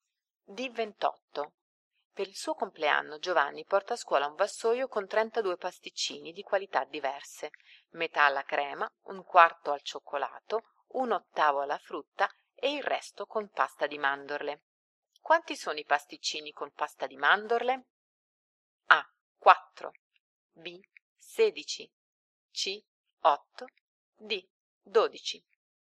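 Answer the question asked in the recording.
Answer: A: 4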